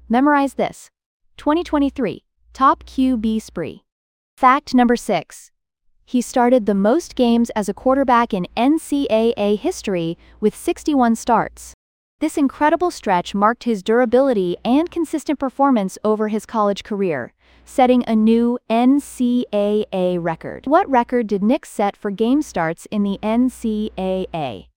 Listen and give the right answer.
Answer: 61 starts.